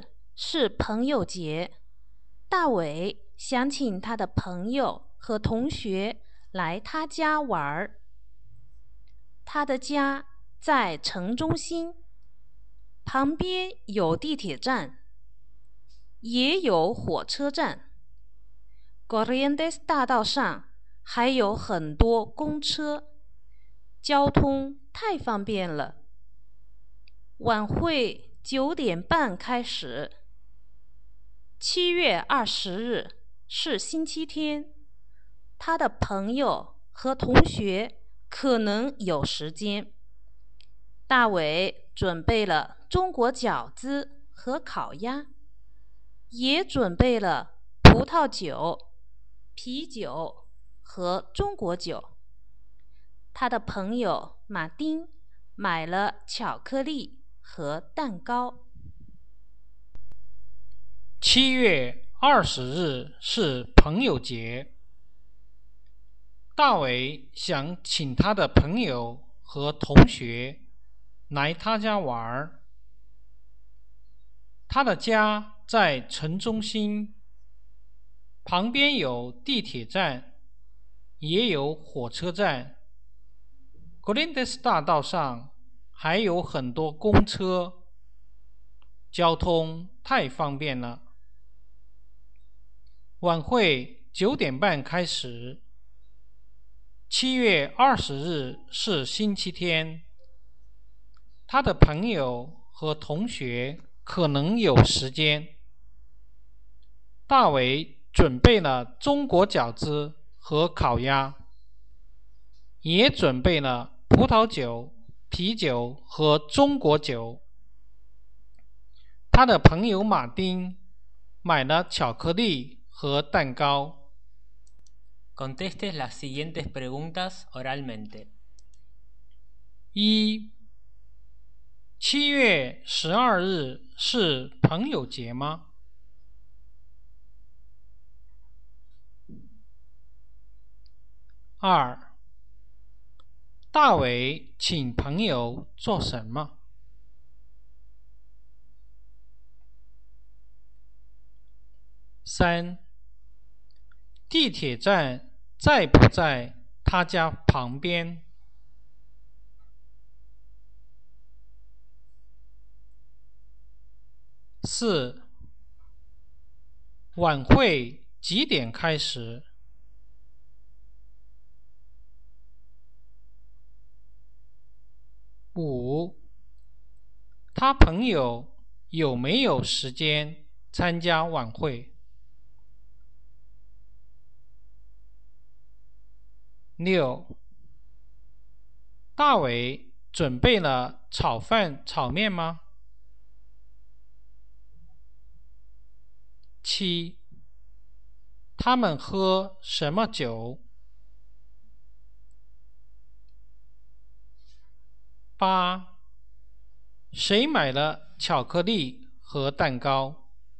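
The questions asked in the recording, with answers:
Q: 7月12日是朋友节吗?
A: 不是,7月20日是朋友节

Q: 大伟请朋友做什么?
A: 来他家玩儿

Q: 晚会9:00开始?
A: 不是,9:30开始

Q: 他朋友有没有时间参加晚会?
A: 可能有时间

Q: 大伟准备了炒饭炒面吗?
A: 没有,准备了饺子和烤鸭

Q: 他们喝什么酒?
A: 葡萄酒、啤酒和中国酒

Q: 谁买了巧克力和蛋糕?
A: 马丁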